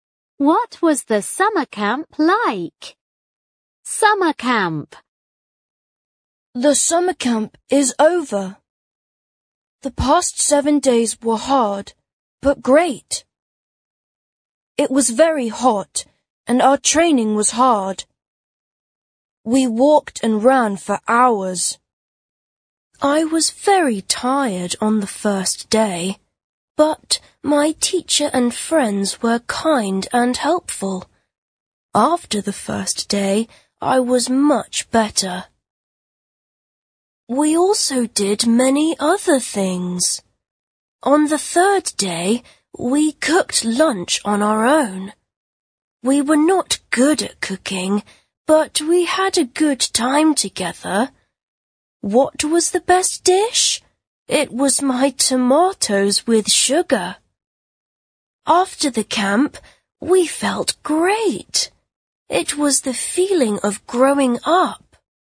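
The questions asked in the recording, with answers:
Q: What was the summer camp like?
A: It was hard, but great.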